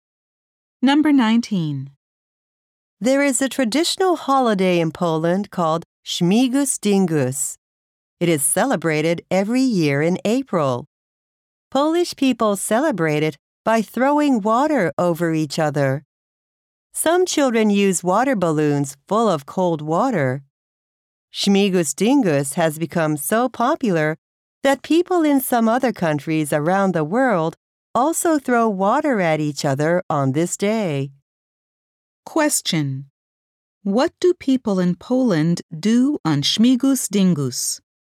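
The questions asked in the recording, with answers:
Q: What do people in Poland do on Śmigus Dingus?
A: They throw water over each other.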